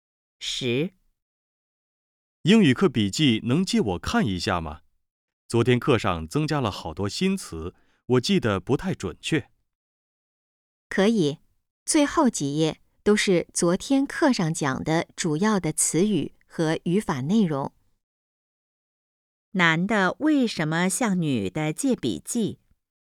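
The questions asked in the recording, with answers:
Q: 男的为什么向女的借笔记?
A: 昨天课上的新词记得不太准确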